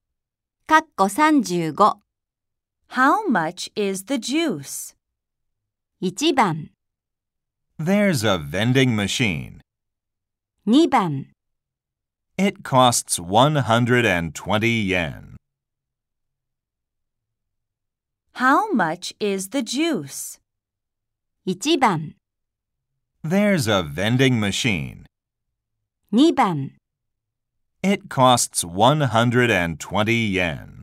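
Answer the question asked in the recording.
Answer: 2: It costs 120 yen.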